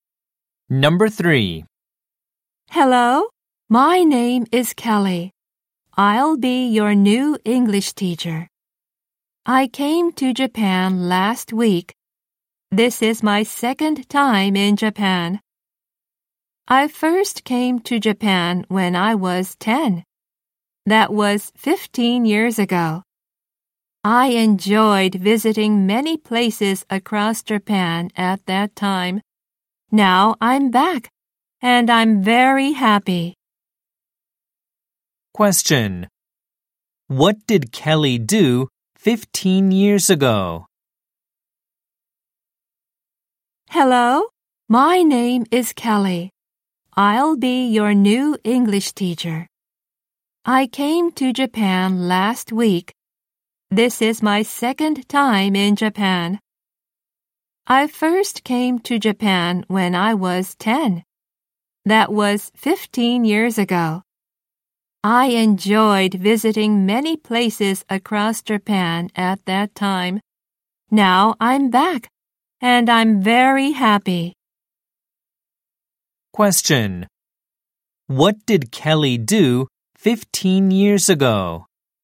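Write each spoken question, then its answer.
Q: What did Kelly do 15 years ago?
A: She came to Japan and visited many places across Japan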